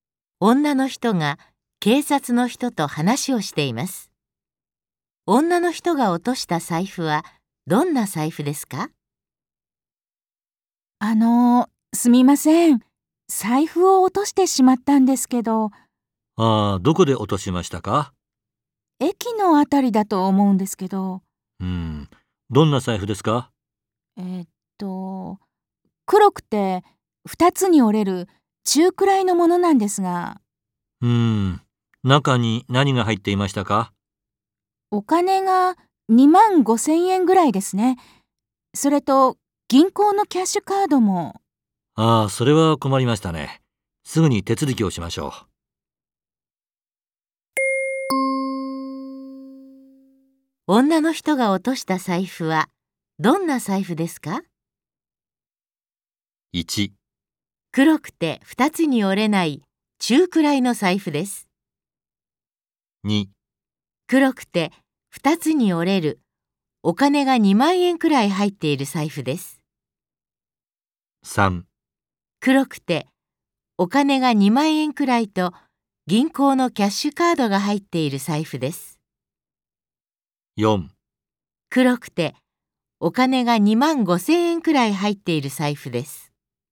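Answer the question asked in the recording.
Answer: 4: 黒くてお金が2万5000円くらい入っている財布です。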